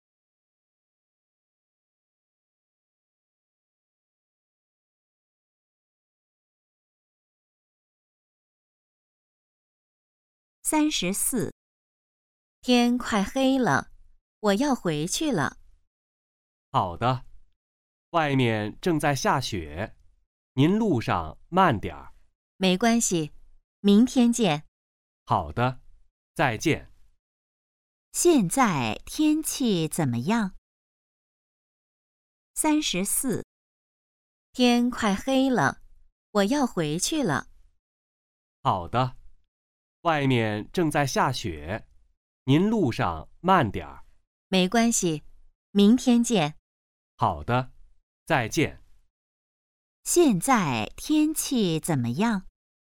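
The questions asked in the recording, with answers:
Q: 现在天气怎么样?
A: 正在下雪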